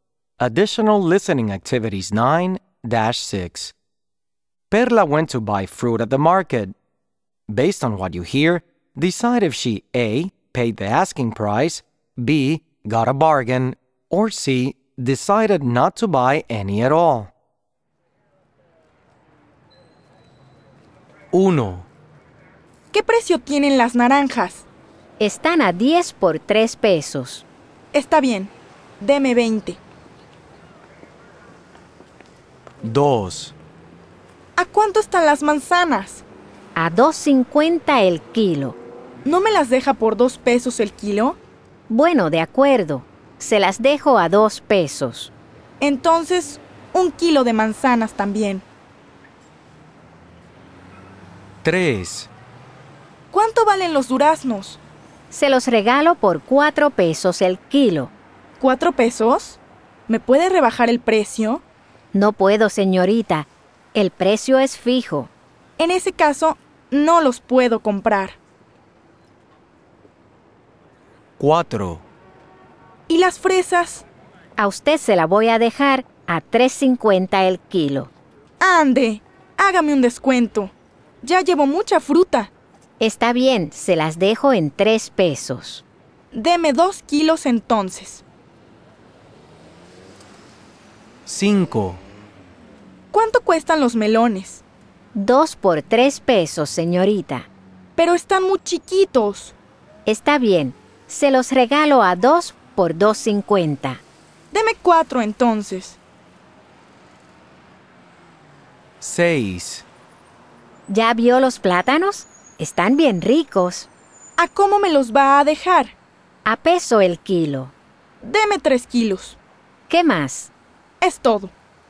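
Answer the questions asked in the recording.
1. A: paid the asking price
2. B: got a bargain
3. C: decided not to buy any at all
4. B: got a bargain
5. B: got a bargain
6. A: paid the asking price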